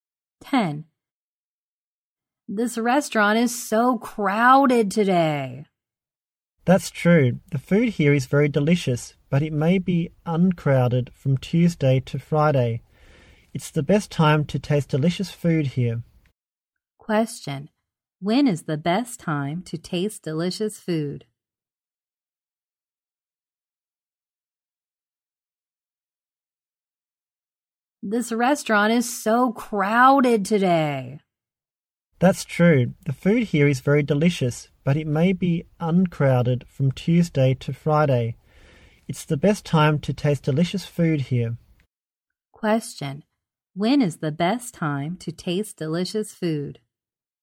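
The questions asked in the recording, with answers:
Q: When is the best time to taste delicious food?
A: From Tuesday to Friday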